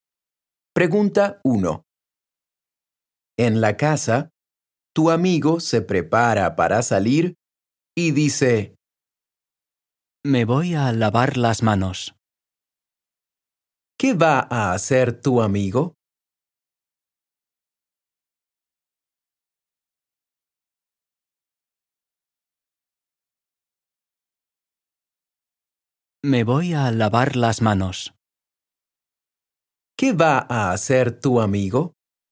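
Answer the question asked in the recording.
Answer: Lavarse las manos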